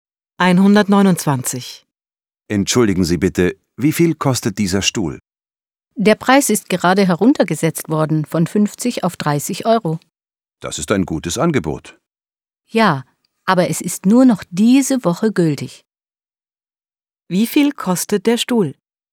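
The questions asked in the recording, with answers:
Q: Wie viel kostet der Stuhl?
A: 30 Euro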